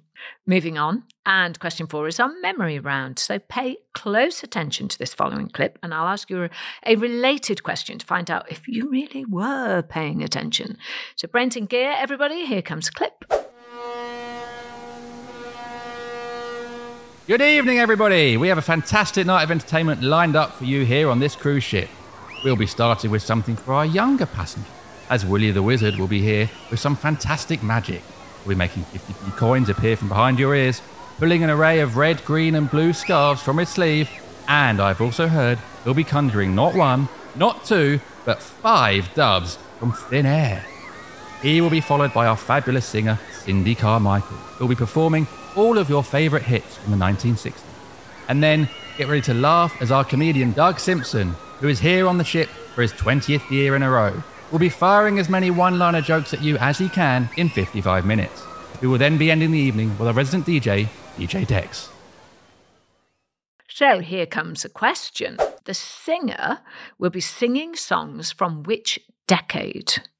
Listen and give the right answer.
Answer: And the answer was the 1960s.